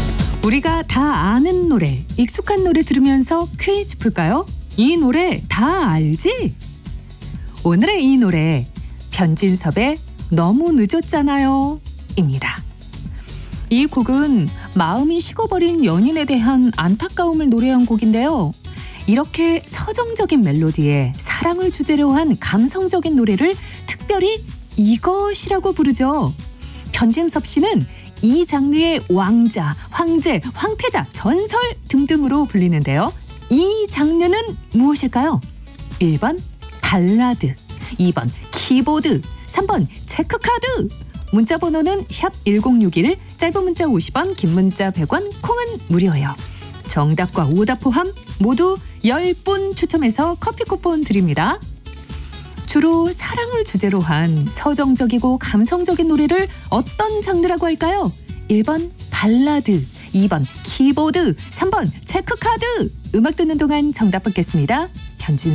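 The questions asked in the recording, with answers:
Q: 주로 사랑을 주제로 한 서정적이고 감성적인 노래를 어떤 장르라고 할까요?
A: 1: 발라드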